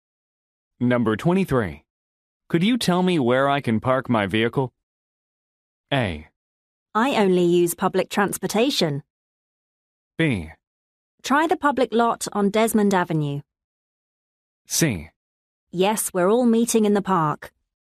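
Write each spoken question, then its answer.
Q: Could you tell me where I can park my vehicle?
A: B: Try the public lot on Desmond Avenue.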